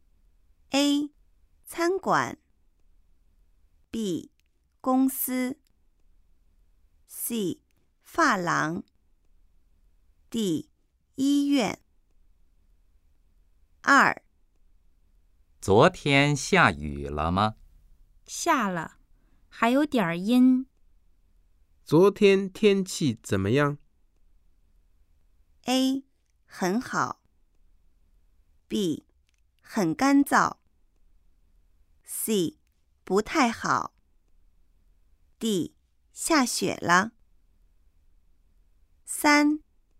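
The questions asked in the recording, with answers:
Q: 昨天天气怎么样?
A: C: 不太好。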